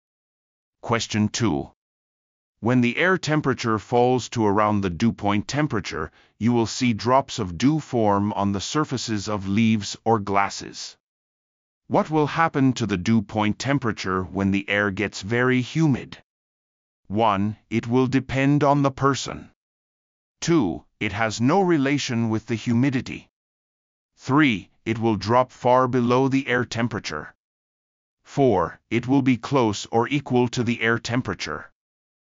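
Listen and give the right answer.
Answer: 4: It will be close or equal to the air temperature.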